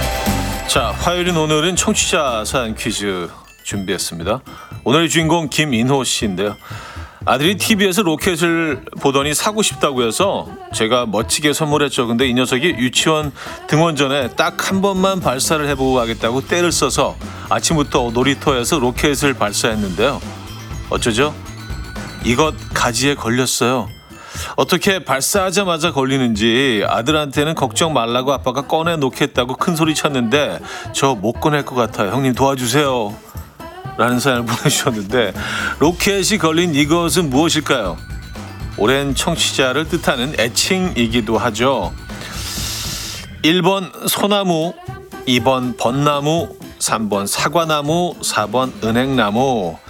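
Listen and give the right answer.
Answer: 1번: 소나무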